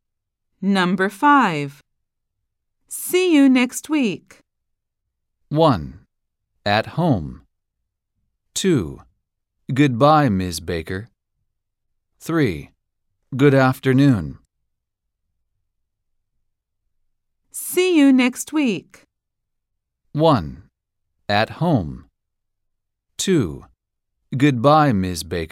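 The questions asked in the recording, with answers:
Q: See you next week.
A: 2: Goodbye, Ms. Baker.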